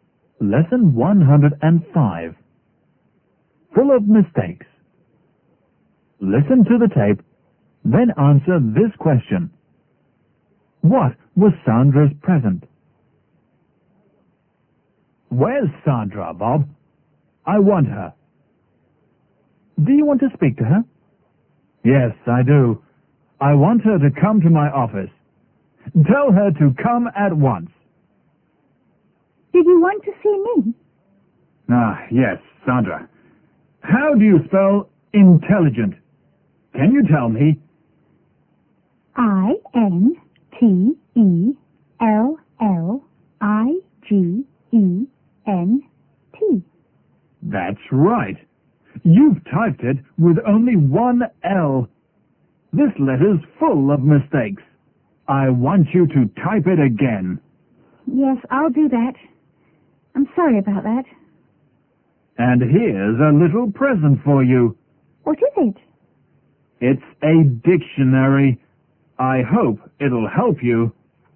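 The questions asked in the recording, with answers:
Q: What was Sandra's present?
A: A dictionary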